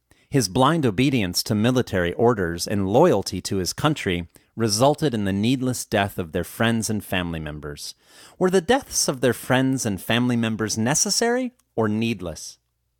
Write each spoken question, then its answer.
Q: Were the deaths of their friends and family members necessary or needless?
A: The deaths of their friends and family members were needless.